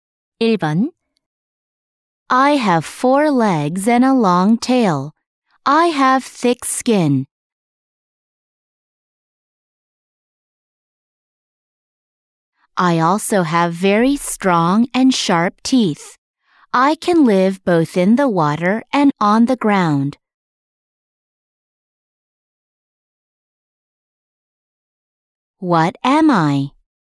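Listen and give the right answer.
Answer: A crocodile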